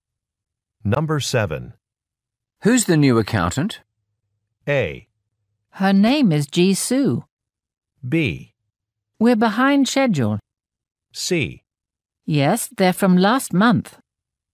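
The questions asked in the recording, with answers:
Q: Who's the new accountant?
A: A: Her name is Jisoo.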